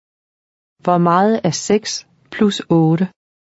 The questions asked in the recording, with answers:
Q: Hvor meget er 6 plus 8?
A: 14.